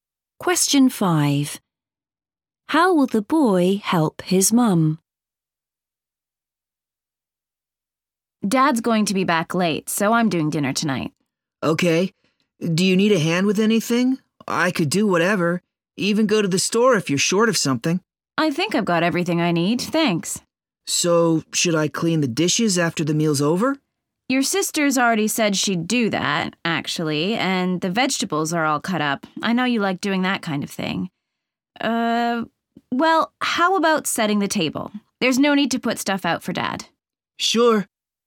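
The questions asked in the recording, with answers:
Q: How will the boy help his mum?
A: By setting the table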